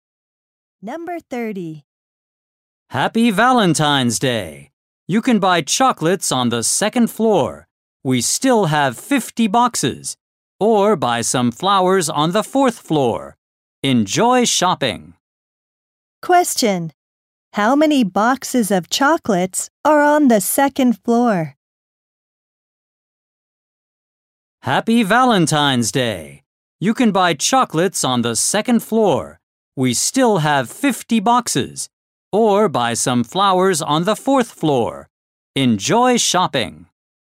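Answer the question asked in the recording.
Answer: 50.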